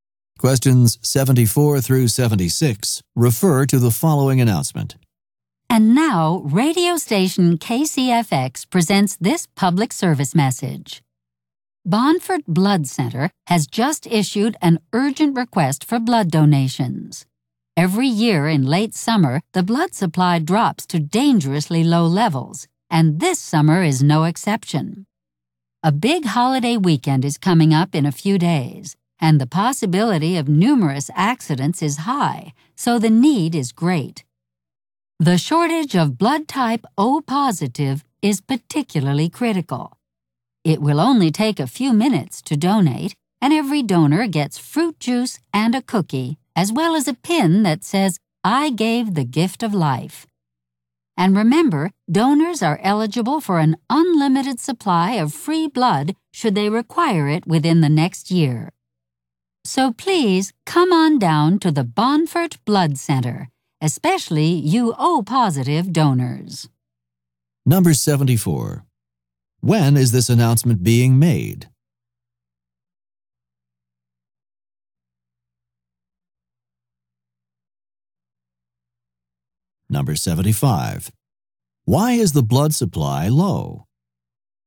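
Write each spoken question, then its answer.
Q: When is this announcement being made?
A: In late summer, a few days before a holiday weekend

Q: Why is the blood supply low?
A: It always drops in late summer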